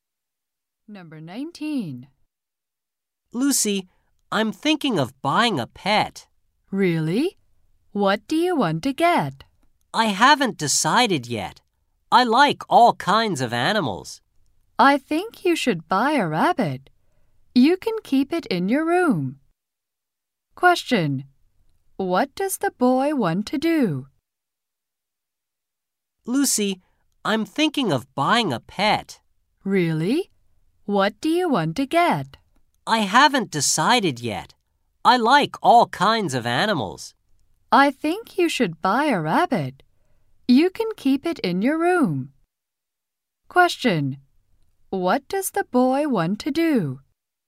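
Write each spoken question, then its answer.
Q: What does the boy want to do?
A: Buy a pet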